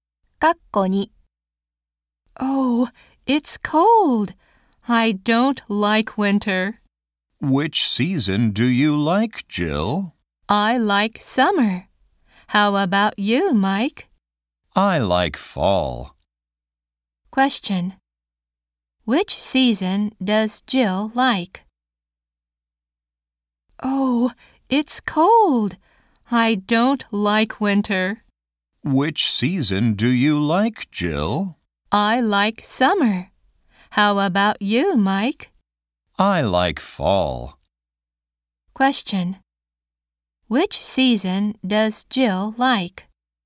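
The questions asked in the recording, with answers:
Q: Which season does Jill like?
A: summer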